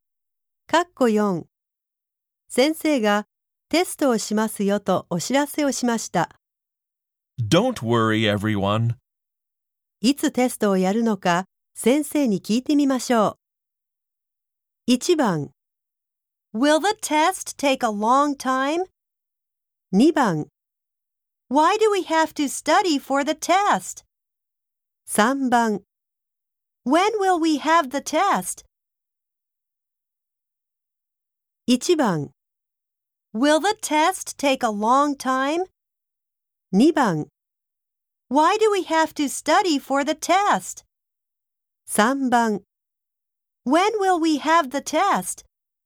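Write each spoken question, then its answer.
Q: いつテストをやるのか先生に聞いてみましょう。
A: 3: When will we have the test?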